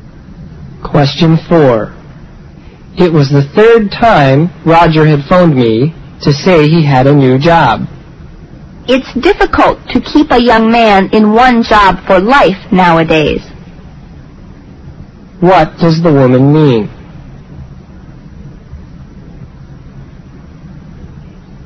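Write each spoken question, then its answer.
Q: What does the woman mean?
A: Young people often change jobs nowadays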